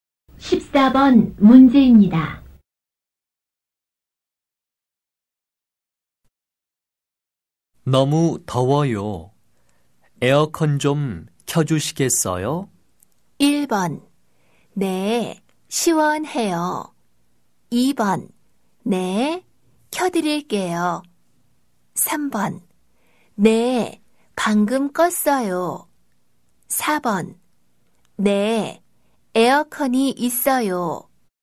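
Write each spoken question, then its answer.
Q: 너무 더워요. 에어컨 좀 켜주시겠어요?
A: 2: 네, 켜드릴게요.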